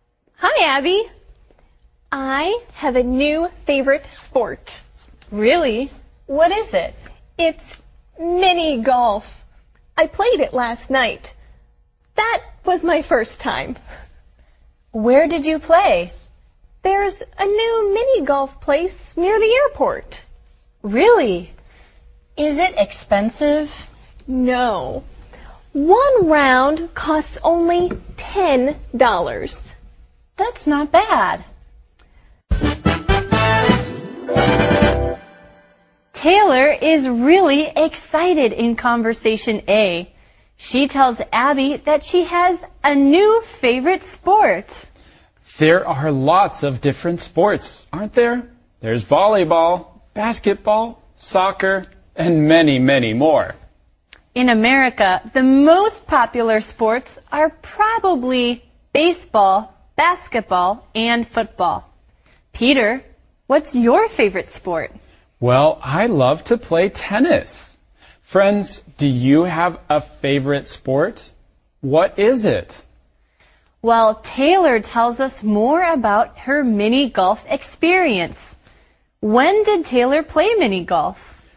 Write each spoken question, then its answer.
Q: When did Taylor play mini golf?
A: Taylor played mini golf last night.